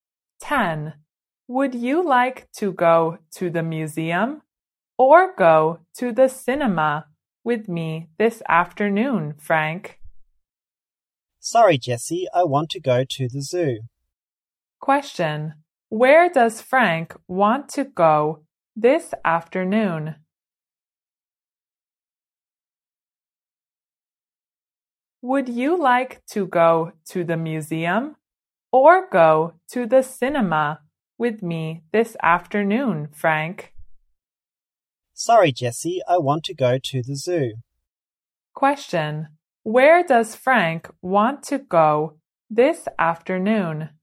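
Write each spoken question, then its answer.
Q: Where does Frank want to go this afternoon?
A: To the zoo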